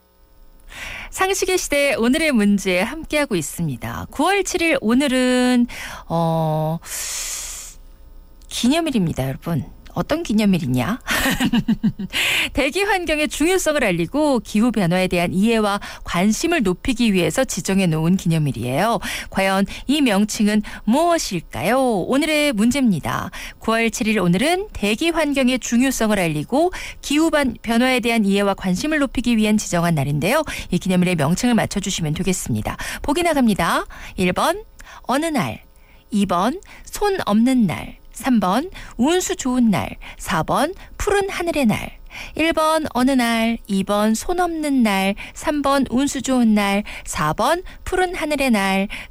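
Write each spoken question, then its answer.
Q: 이 기념일의 명칭을 맞춰주시면 되겠습니다.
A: 4번: 푸른 하늘의 날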